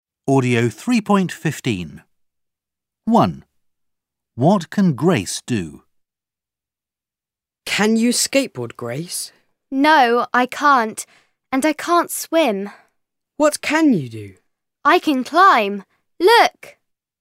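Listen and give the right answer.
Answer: She can climb.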